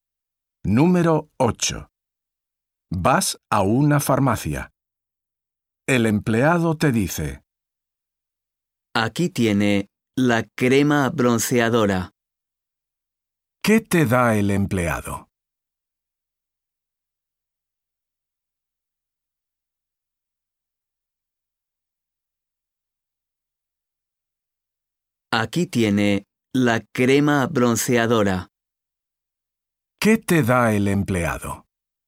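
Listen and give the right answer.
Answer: Crema bronceadora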